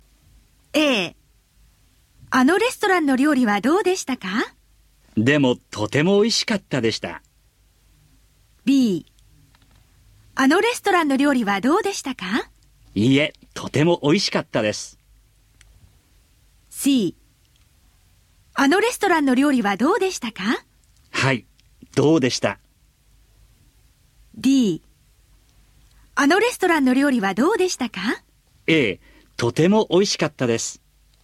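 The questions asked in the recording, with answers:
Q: あのレストランの料理はどうでしたか?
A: D: ええ、とても美味しかったです。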